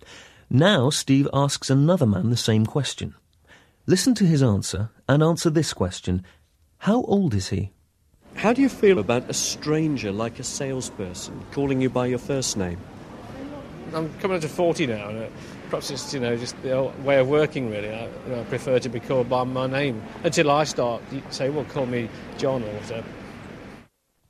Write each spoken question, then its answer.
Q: How old is he?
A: Ему около 40.